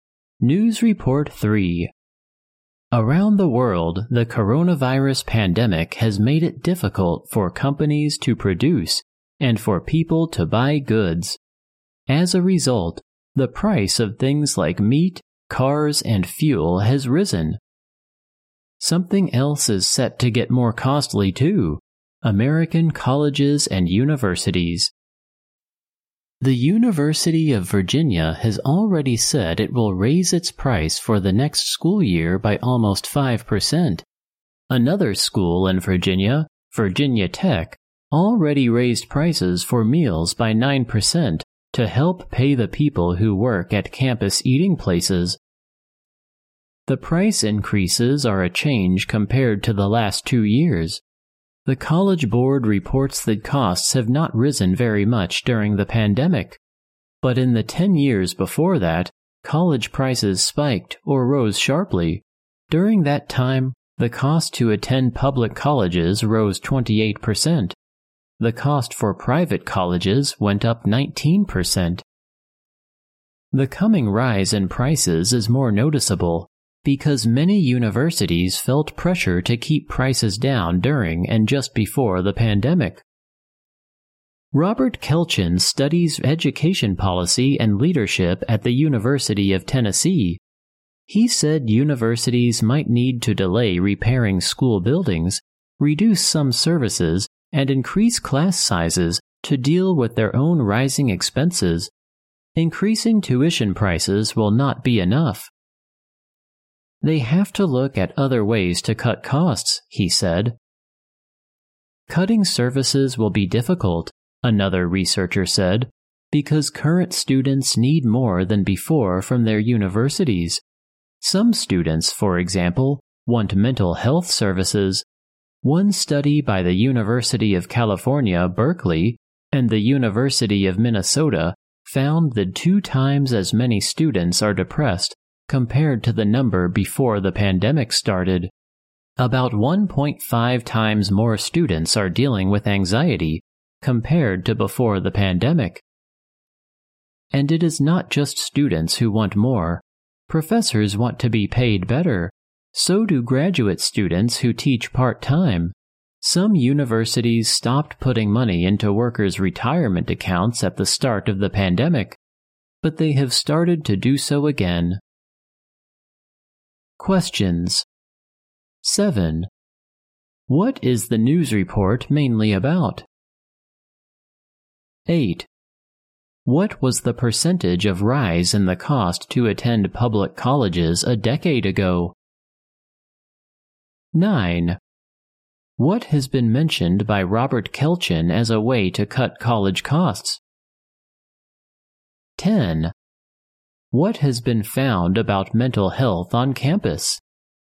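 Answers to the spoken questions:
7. Rising costs of American colleges and universities
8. 28%
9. Delaying repairs to school buildings, reducing some services and increasing class sizes
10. Twice as many students are depressed as before the pandemic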